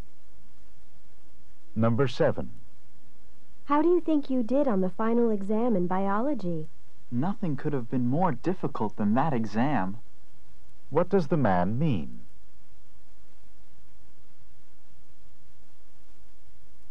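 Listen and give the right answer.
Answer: The exam was extremely difficult.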